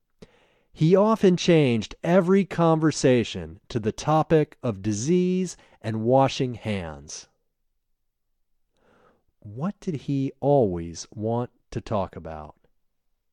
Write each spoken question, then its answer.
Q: What did he always want to talk about?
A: He always wanted to talk about disease and washing hands.